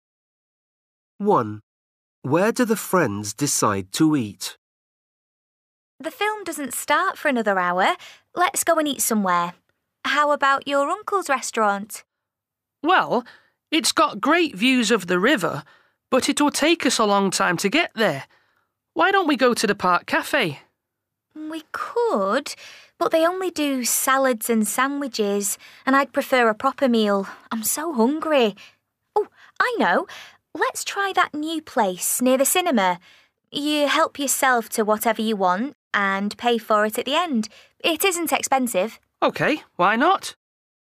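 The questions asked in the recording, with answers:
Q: Where do the friends decide to eat?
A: the new self-service place near the cinema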